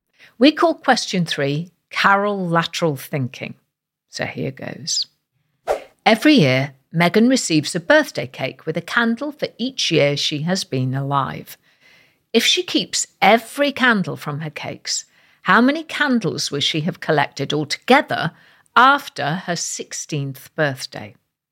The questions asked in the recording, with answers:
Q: If she keeps every candle from her cakes, how many candles will she have collected altogether after her 16th birthday?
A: And the answer is 136 candles.